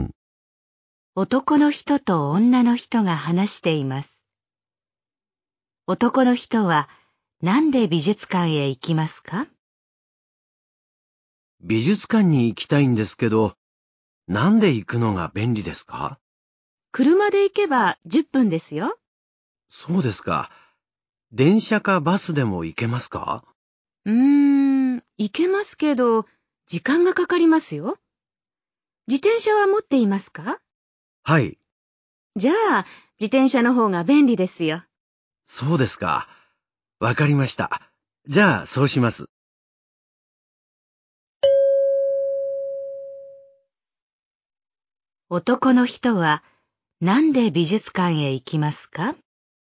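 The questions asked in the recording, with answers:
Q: 男の人は、なんで美術館へ行きますか?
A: 自転車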